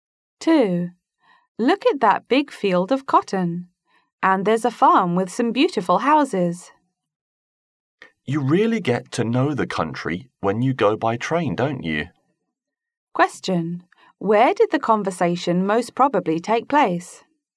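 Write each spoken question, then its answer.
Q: Where did the conversation most probably take place?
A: On a train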